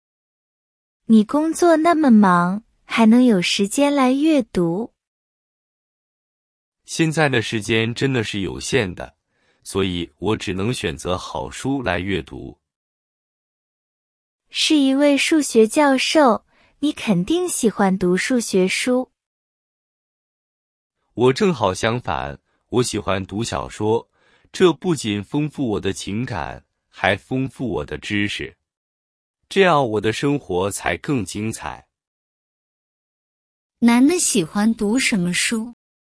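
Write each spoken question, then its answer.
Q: 男的喜欢读什么书?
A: 小说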